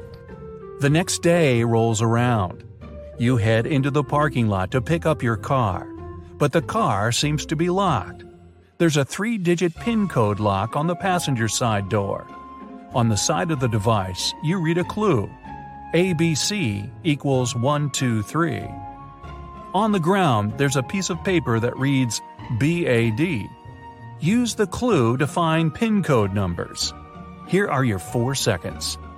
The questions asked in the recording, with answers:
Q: Use the clue to find PIN code numbers.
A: The code is 214. B is the second letter, A is the first, and D is the fourth.